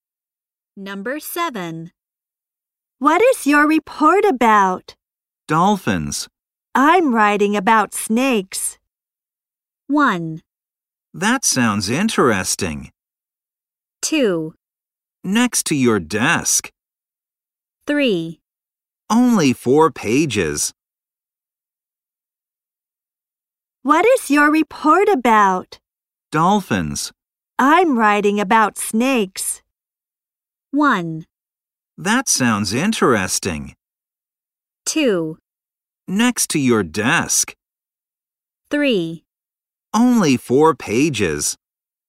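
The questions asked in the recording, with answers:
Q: I'm writing about snakes.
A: 1: That sounds interesting.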